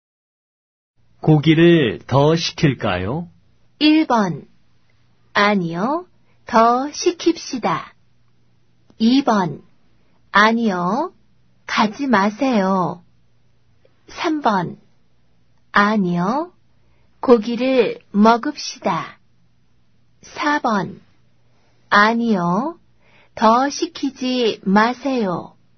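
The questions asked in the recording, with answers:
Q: 고기를 더 시킬까요?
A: 4: 아니요. 더 시키지 마세요.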